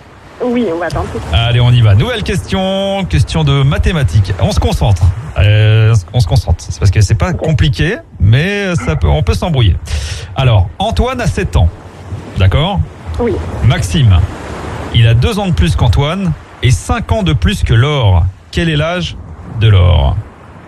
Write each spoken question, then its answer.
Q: Quel est l'âge de Laure?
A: 4 ans.